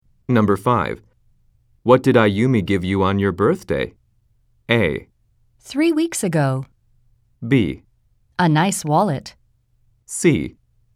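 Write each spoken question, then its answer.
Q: What did Ayumi give you on your birthday?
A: B: A nice wallet.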